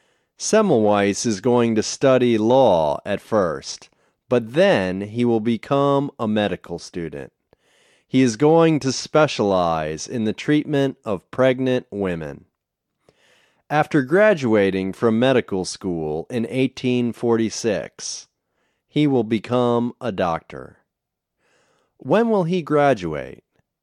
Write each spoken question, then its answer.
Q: When will he graduate?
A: He will graduate in 1846.